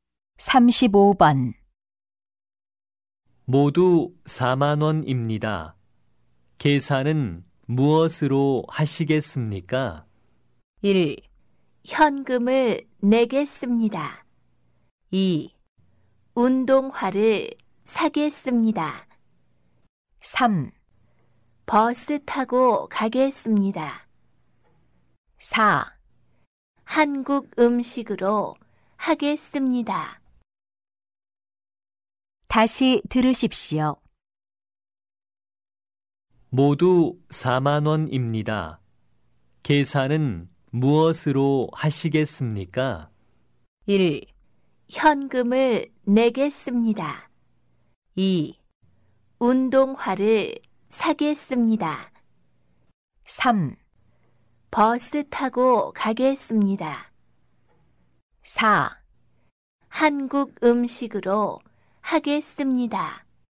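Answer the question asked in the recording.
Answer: 1: 현금을 내겠습니다.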